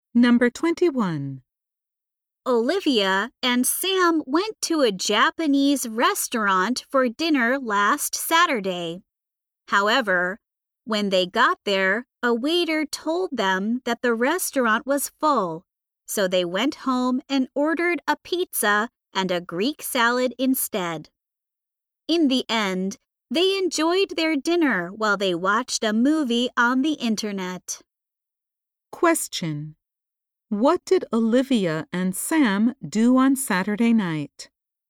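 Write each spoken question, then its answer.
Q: What did Olivia and Sam do on Saturday night?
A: They ate pizza and salad at home while watching a movie.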